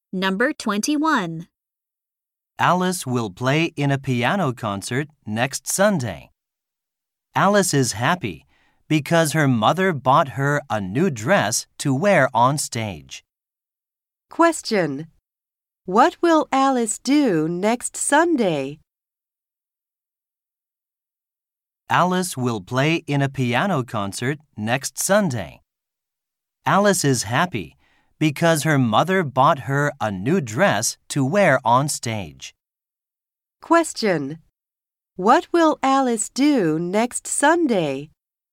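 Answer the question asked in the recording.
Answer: Play in a piano concert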